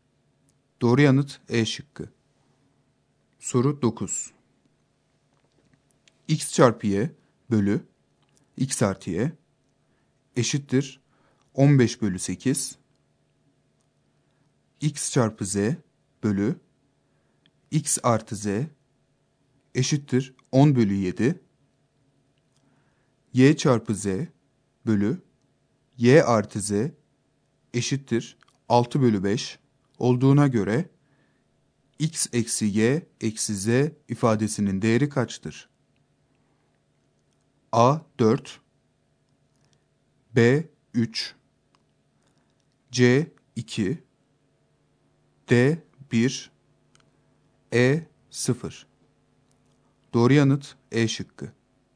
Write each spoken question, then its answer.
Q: Y çarpı Z bölü Y artı Z eşittir 6 bölü 5 olduğuna göre x eksi y eksi z ifadesinin değeri kaçtır?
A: Doğru yanıt E şıkkı.